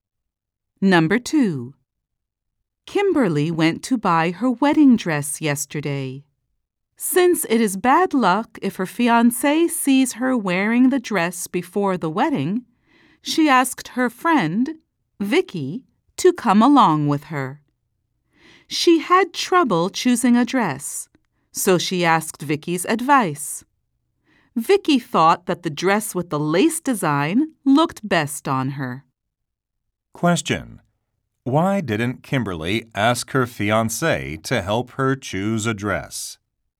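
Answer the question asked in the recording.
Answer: It is bad luck if her fiancé sees her wearing the dress before the wedding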